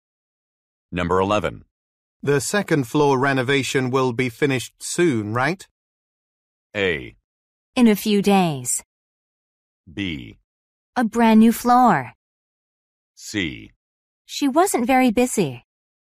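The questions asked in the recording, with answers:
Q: The second floor renovation will be finished soon, right?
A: A: In a few days.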